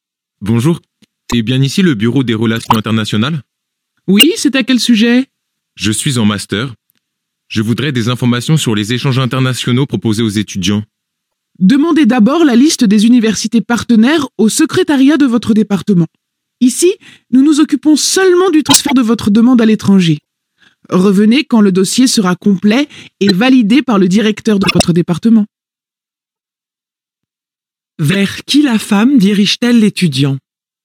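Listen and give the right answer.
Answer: Vers le secrétariat de son département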